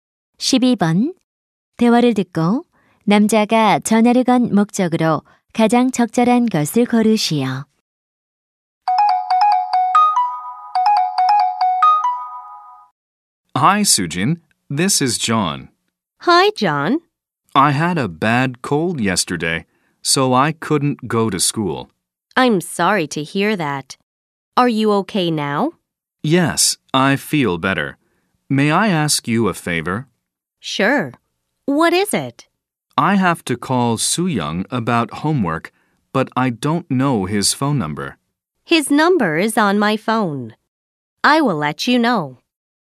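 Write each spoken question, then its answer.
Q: 대화를 듣고 남자가 전화를 건 목적으로 가장 적절한 것을 고르시오.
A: 수영이의 전화번호를 물어보려고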